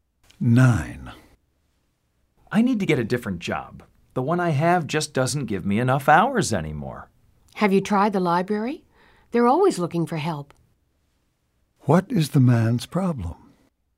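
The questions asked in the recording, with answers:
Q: What is the man's problem?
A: His job doesn't give him enough hours.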